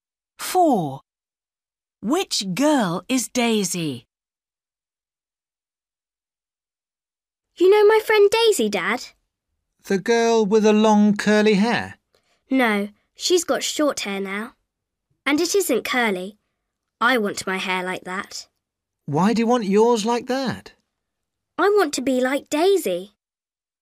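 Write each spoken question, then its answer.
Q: Which girl is Daisy?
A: The girl with short, straight hair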